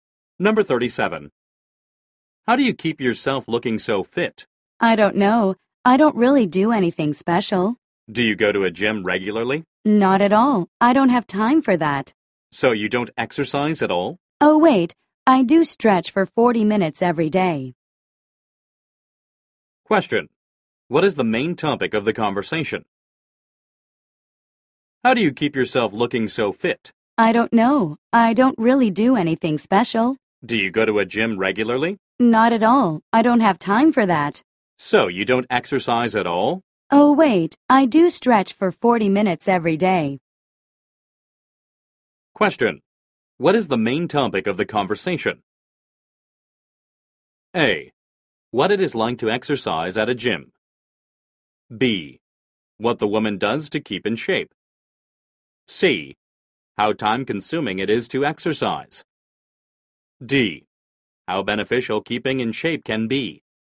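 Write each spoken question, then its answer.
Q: What is the main topic of the conversation?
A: B: What the woman does to keep in shape.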